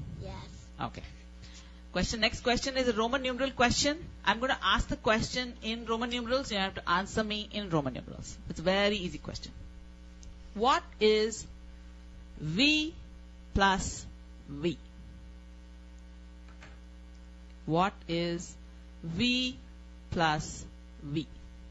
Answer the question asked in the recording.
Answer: V plus V equals X.